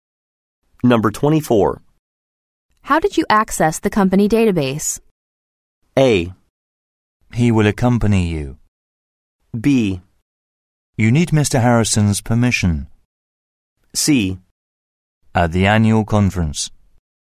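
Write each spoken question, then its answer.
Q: How did you access the company database?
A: B: You need Mr. Harrison's permission.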